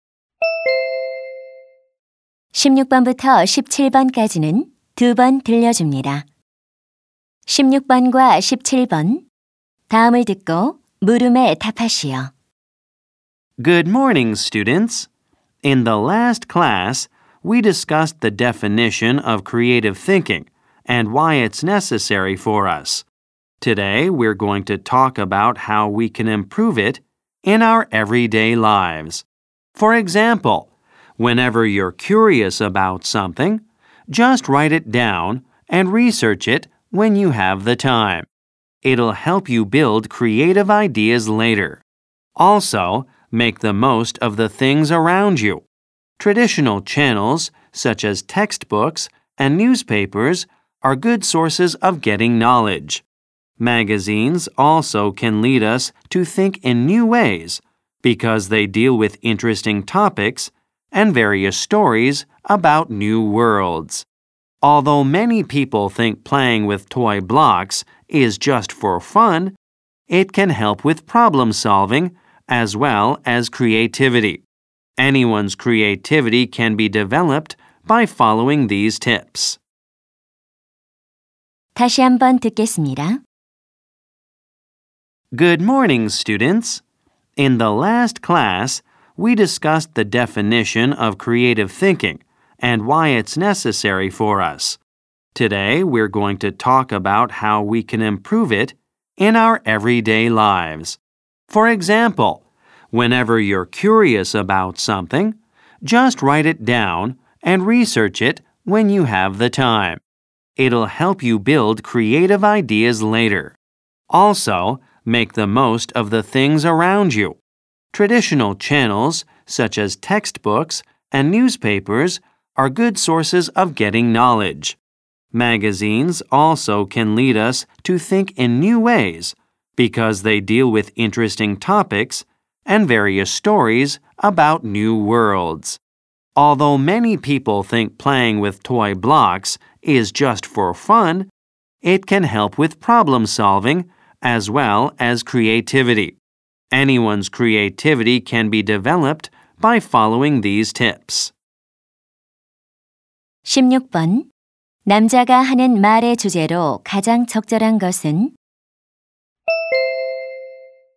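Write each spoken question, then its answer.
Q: 남자가 하는 말의 주제로 가장 적절한 것은?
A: 일상생활에서 창의력을 향상시키는 방법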